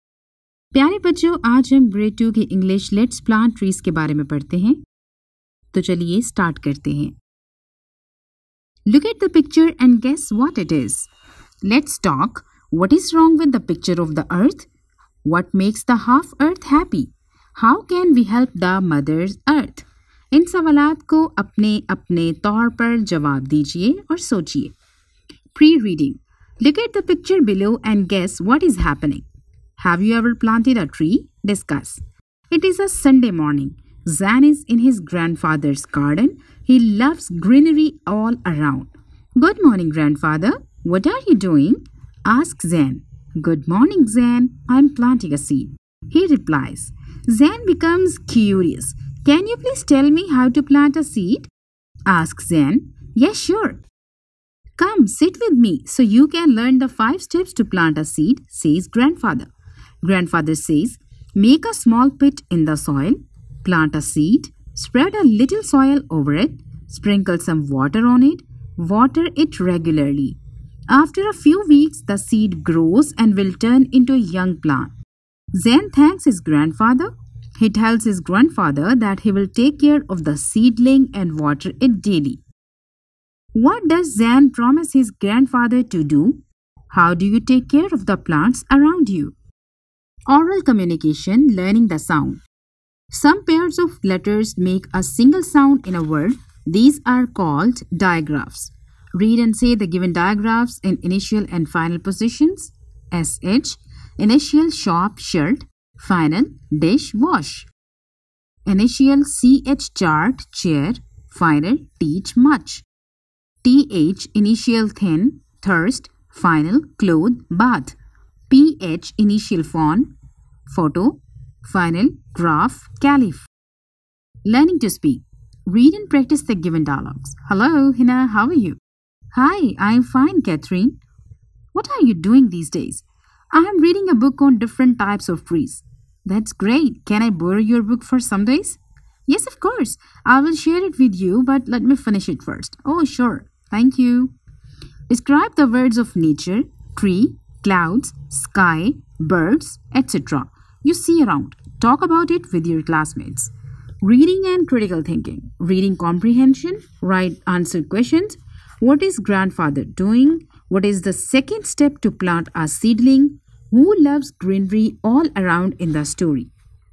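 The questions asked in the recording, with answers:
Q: What does Zan promise his grandfather to do?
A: To take care of the seedling and water it daily

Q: What is grandfather doing?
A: Planting a seed

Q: What is the second step to plant a seedling?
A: Plant a seed

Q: Who loves greenery all around in the story?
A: Zan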